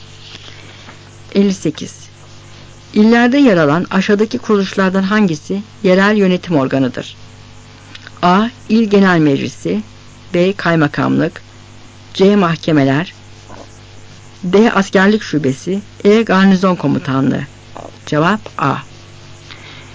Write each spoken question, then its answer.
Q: İllerde yer alan aşağıdaki kuruluşlardan hangisi yerel yönetim organıdır?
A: Cevap A.